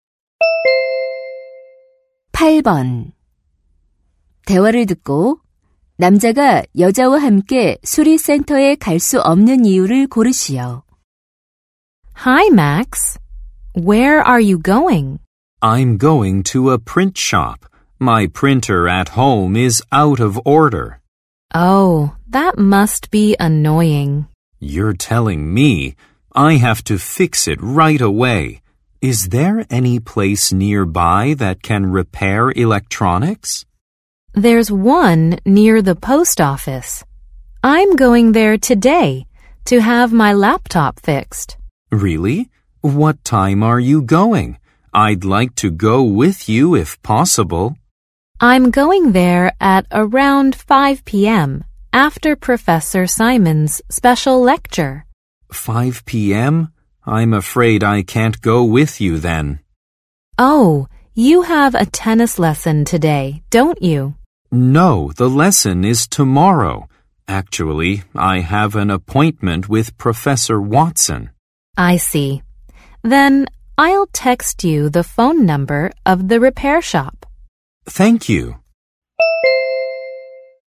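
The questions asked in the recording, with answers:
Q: 대화를 듣고 남자가 여자와 함께 수리센터에 갈 수 없는 이유를 고르시오.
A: Watson 교수와 약속이 있어서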